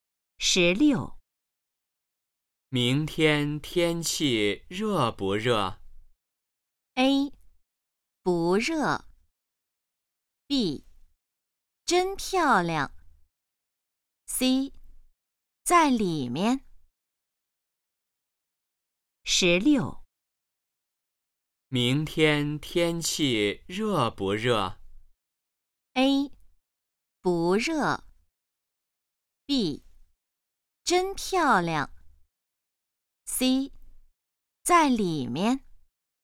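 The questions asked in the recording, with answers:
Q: 明天天气热不热?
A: A: 不热。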